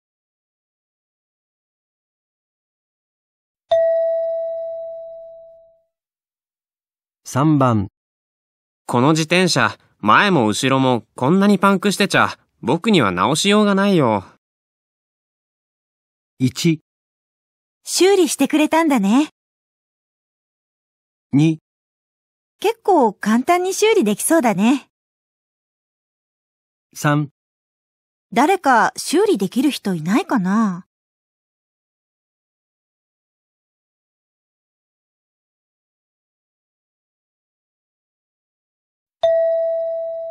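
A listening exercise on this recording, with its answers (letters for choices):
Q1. 男:この自転車、前も後もこんなにパンクしてちゃ、僕には直しようがないよ。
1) 修理してくれたんだね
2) 結構簡単に修理できそうだね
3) 誰か修理できる人いないかな?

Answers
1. 3

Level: 【N2 第2回】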